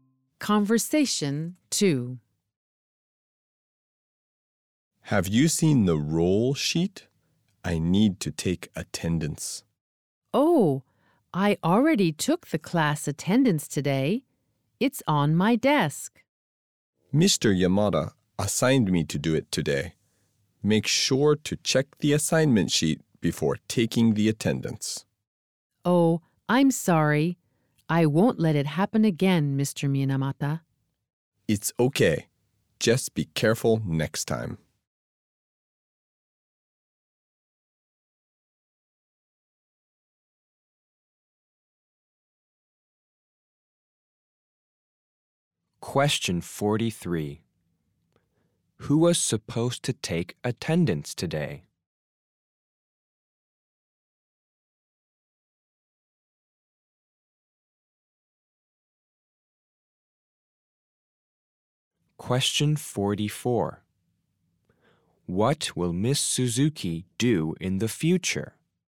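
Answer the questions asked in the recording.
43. Mr. Minamata
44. Check the assignment sheet before taking attendance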